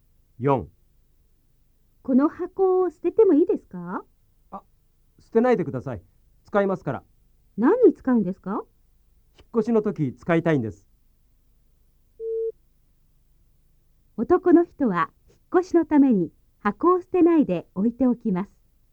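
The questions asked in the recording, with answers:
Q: 男の人は引っ越しのために箱を捨てないで置いておきます。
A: ○(正しい)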